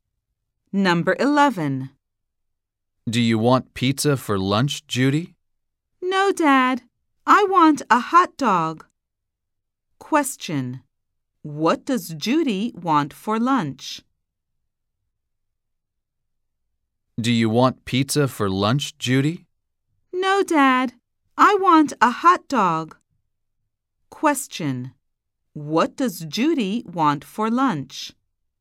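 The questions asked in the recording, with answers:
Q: What does Judy want for lunch?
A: A hot dog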